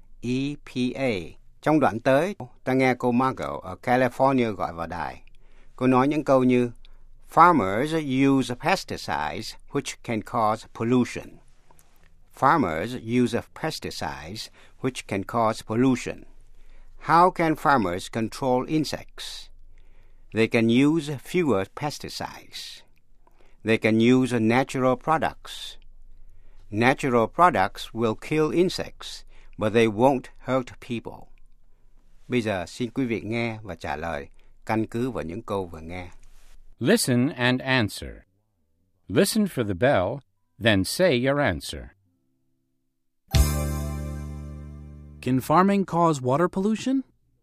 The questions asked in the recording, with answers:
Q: Can farming cause water pollution?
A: Yes, it can. Farmers use pesticides which can cause water pollution.